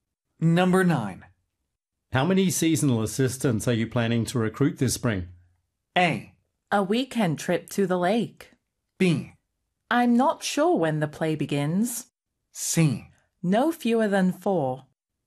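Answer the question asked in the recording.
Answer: C: No fewer than 4.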